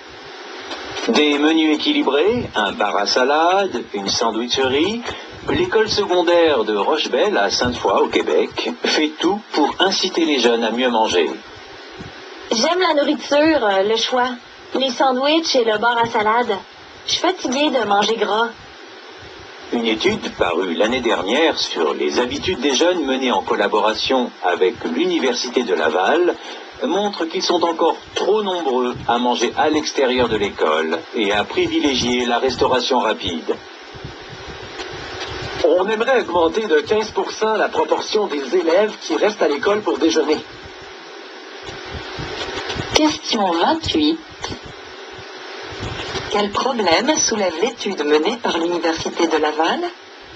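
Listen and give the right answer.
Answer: Trop de jeunes mangent à l'extérieur de l'école et privilégient la restauration rapide.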